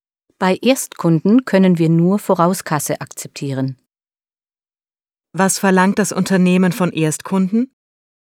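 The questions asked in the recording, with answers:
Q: Was verlangt das Unternehmen von Erstkunden?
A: Vorauskasse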